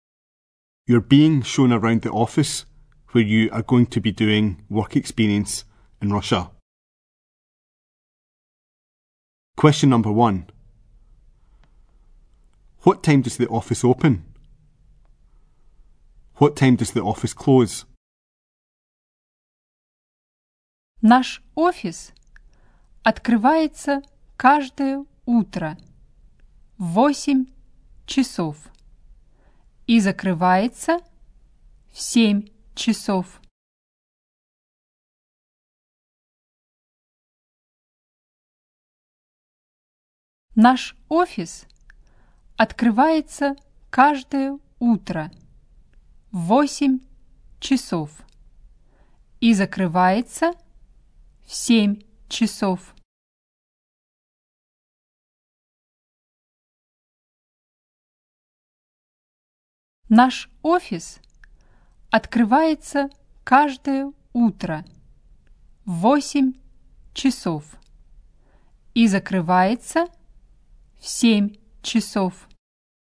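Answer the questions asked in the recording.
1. 8 o'clock
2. 7 o'clock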